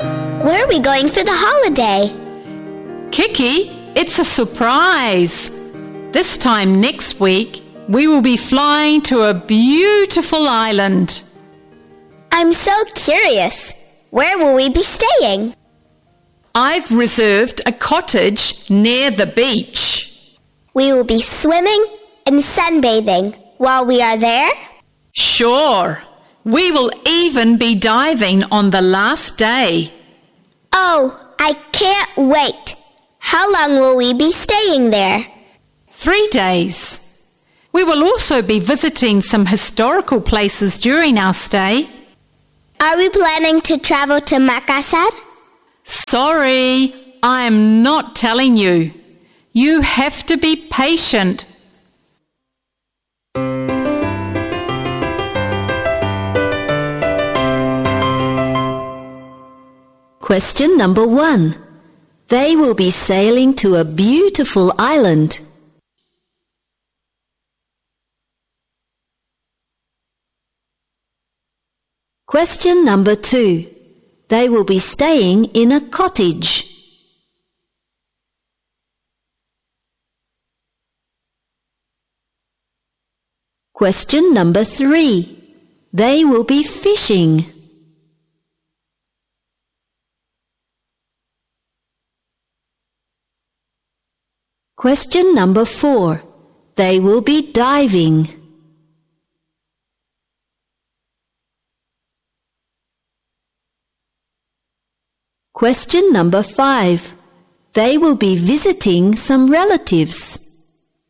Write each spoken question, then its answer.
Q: They will be sailing to a beautiful island.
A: False.

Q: They will be staying in a cottage.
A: True.

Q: They will be fishing.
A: False.

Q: They will be diving.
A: True.

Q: They will be visiting some relatives.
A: False.